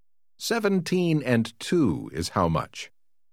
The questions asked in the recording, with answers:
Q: 17 and 2 is how much?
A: 19.